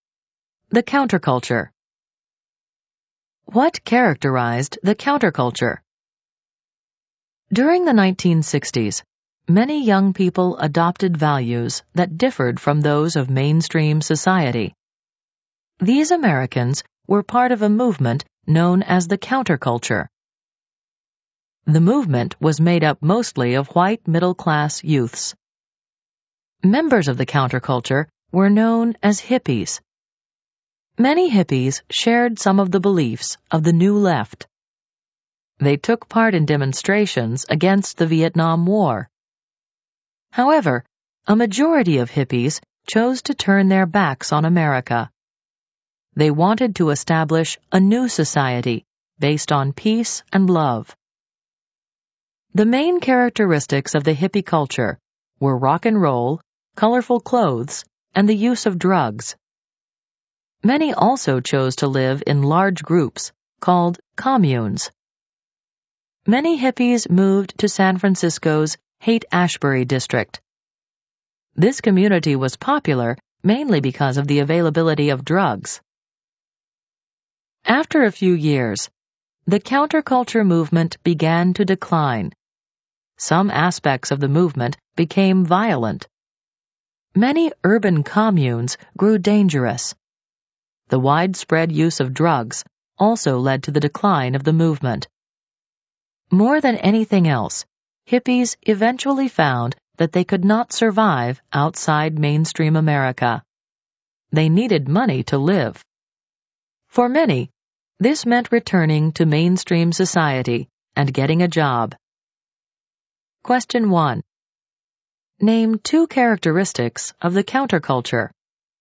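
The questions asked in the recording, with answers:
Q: Name two characteristics of the counterculture.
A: Rock and roll, colorful clothes, drug use, living in communes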